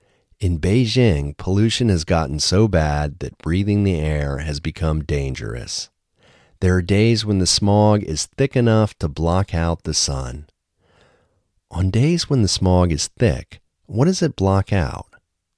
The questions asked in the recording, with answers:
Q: On days when the smog is thick, what does it block out?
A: On days when the smog is thick, it blocks out the sun.